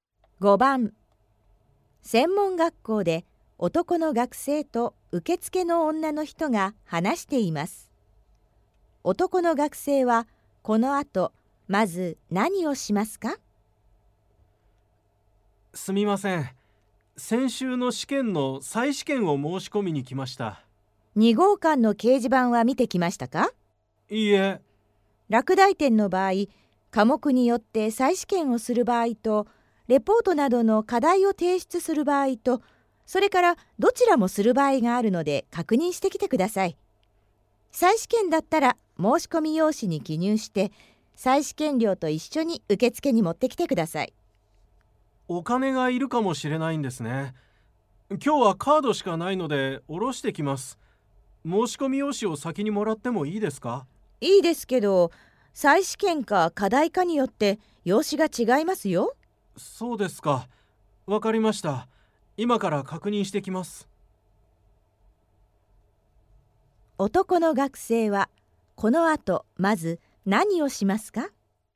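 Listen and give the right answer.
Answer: 2号館の掲示板を見て、再試験か課題か確認する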